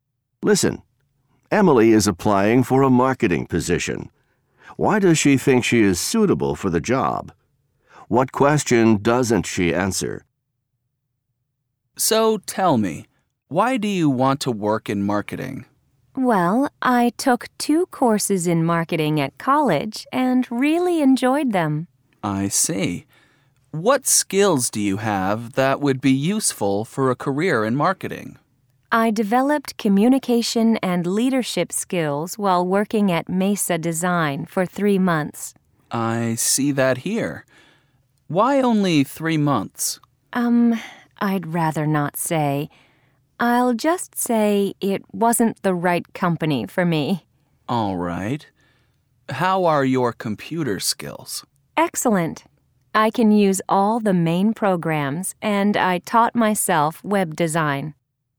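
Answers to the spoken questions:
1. She took marketing courses, has communication and leadership skills, and has excellent computer skills
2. Why she worked at Mesa Design for only 3 months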